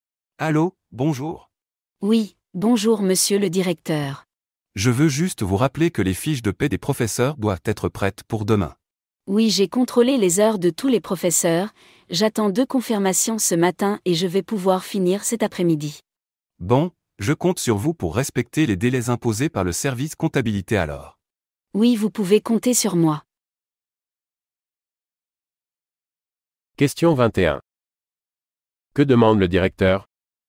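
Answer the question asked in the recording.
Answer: Que les fiches de paie des professeurs soient prêtes pour demain.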